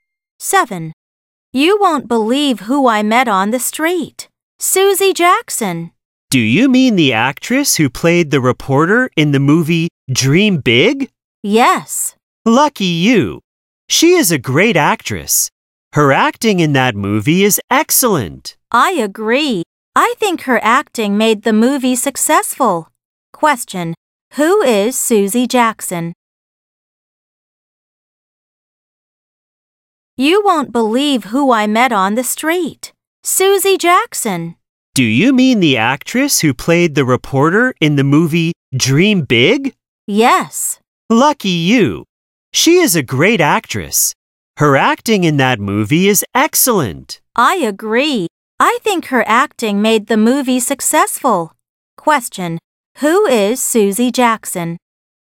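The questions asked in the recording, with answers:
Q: Who is Susie Jackson?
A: An actress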